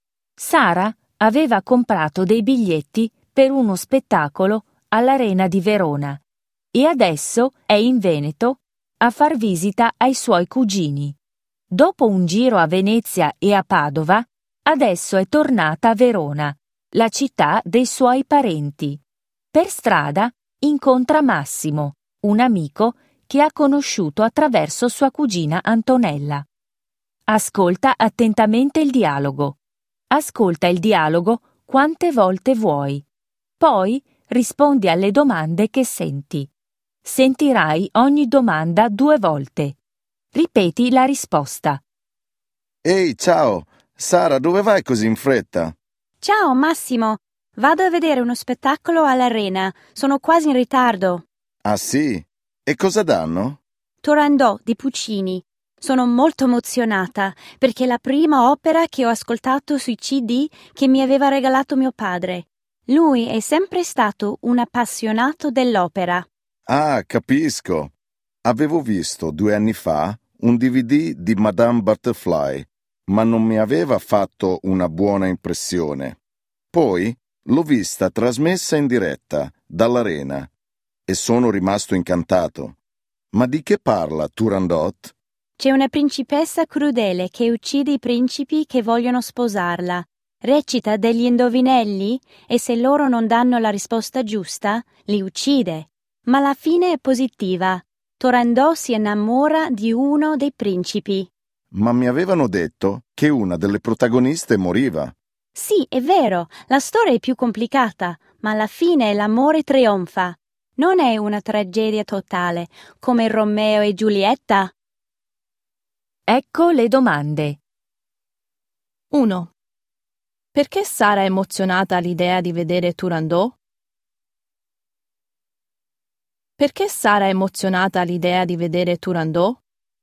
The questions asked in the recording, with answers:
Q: Perché Sara è emozionata all'idea di vedere Turandot?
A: Perché è la prima opera che ha ascoltato?